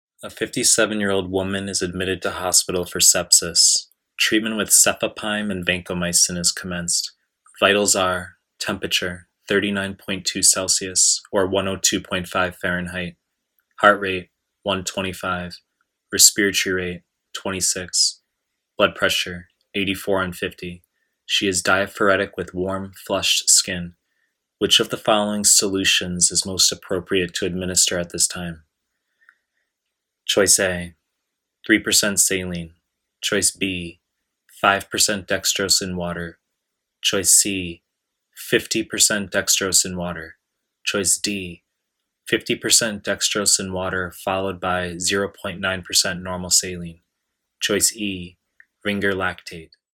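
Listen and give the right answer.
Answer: E: Ringer lactate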